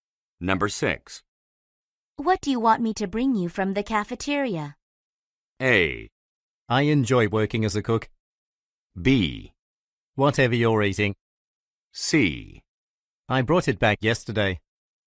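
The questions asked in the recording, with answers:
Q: What do you want me to bring you from the cafeteria?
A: B: Whatever you're eating.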